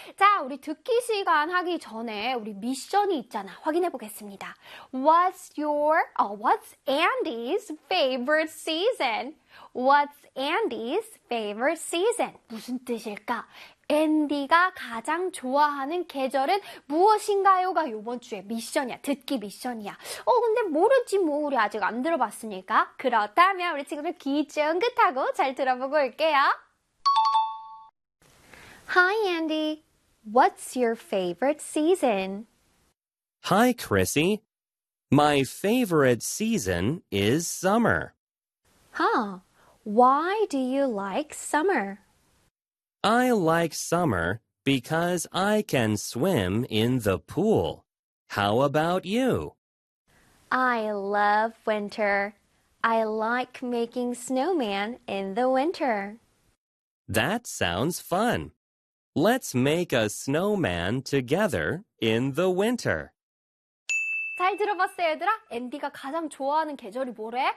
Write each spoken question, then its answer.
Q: What's Andy's favorite season?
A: Summer, 바로 여름이래요.